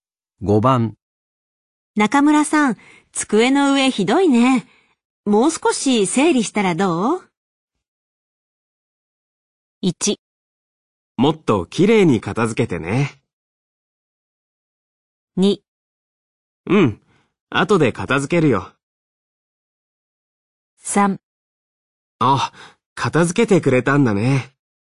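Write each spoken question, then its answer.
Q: 中村さん、机の上ひどいね。もう少し整理したらどう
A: 2: うん。後で片付けるよ。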